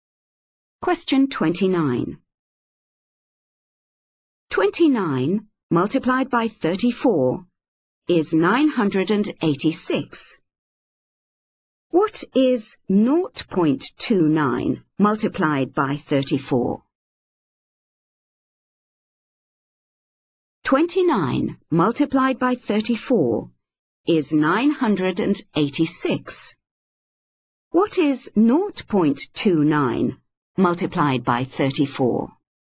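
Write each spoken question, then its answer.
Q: What is 0.29 multiplied by 34?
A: 9.86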